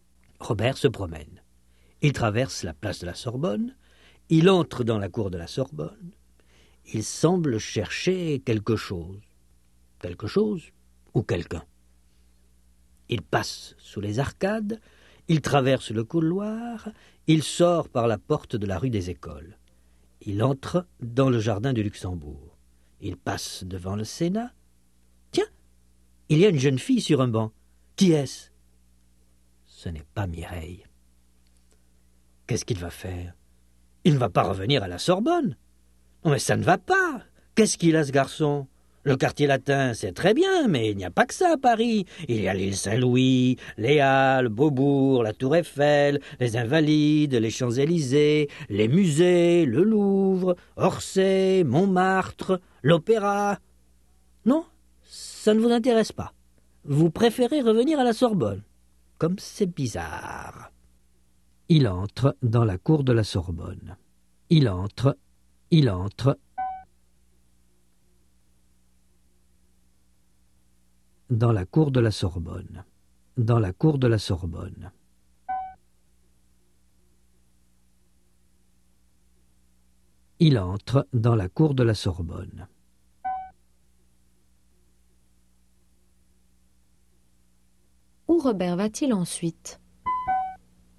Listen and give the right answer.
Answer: À la Sorbonne.